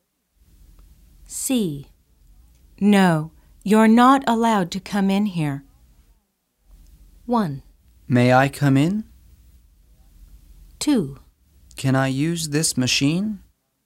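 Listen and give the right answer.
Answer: 1: May I come in?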